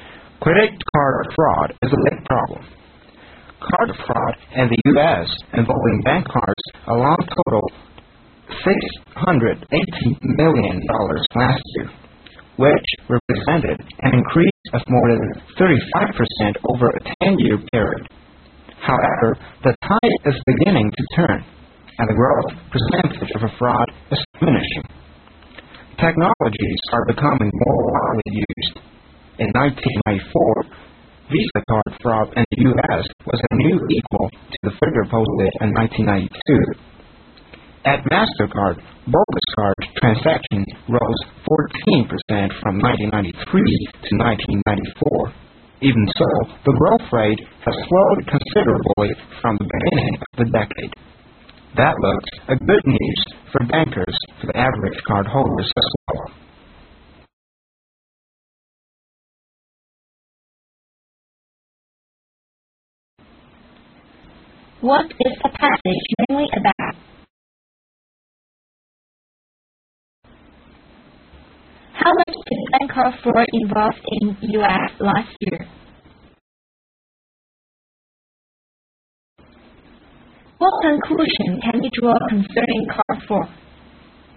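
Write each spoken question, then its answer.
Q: What is the passage mainly about?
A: Credit card fraud in the U.S. and how its growth is slowing

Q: How much did bank card fraud involve in U.S. last year?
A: $680 million

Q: What conclusion can you draw concerning card fraud?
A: The growth rate of card fraud is slowing down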